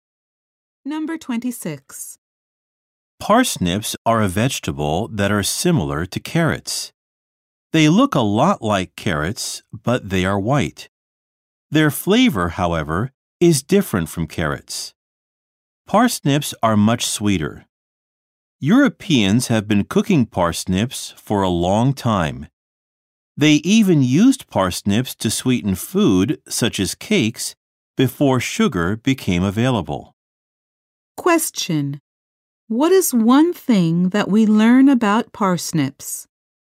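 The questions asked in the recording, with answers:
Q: What is one thing that we learn about parsnips?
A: They were used to sweeten food before sugar was available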